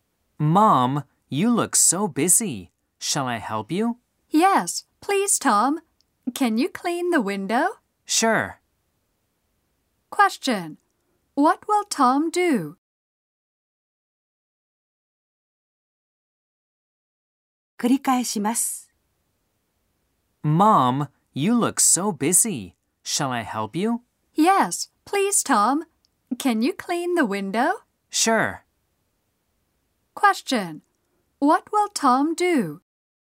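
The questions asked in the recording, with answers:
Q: What will Tom do?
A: Clean the window.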